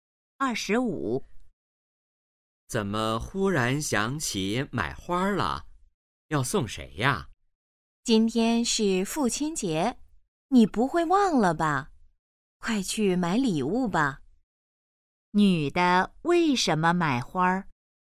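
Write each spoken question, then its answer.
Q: 女的为什么买花儿?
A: 今天是父亲节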